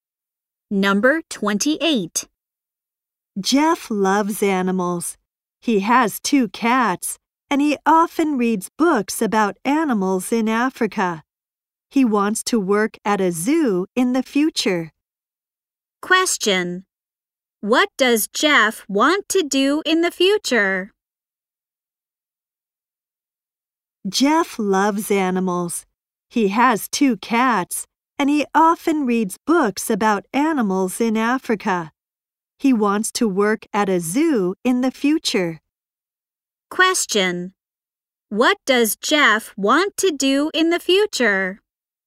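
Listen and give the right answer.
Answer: Work at a zoo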